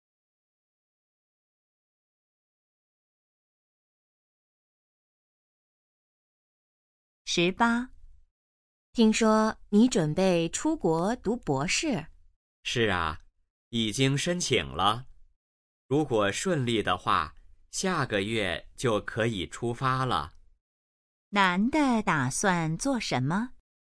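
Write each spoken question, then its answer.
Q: 男的打算做什么?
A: 出国读博士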